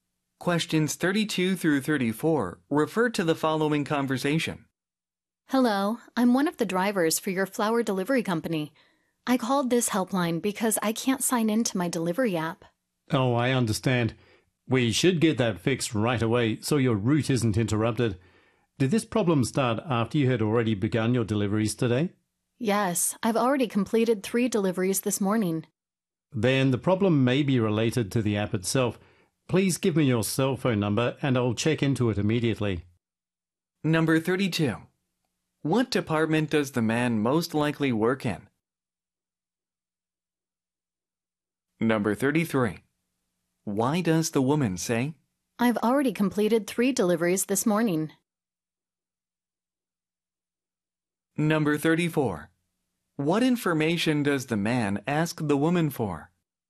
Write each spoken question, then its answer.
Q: What department does the man most likely work in?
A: A번 Customer Support라고 볼 수가 있는 거죠.

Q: What information does the man ask the woman for?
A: 그래서 34번 정답은 B번이 되겠습니다.